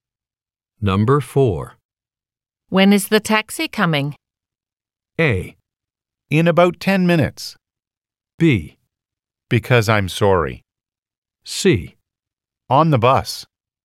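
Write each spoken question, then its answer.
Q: When is the taxi coming?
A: A: In about 10 minutes.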